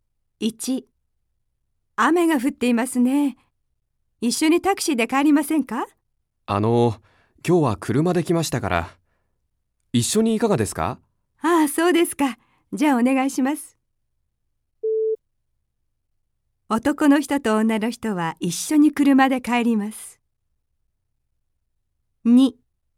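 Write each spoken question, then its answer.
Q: 男の人と女の人は一緒に車で帰ります。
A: ○(正しい)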